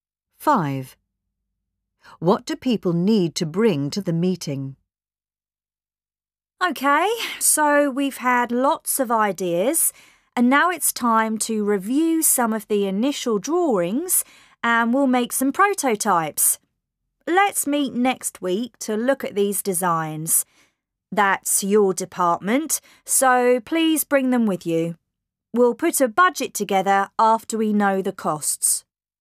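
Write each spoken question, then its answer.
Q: What do people need to bring to the meeting?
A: The initial drawings/designs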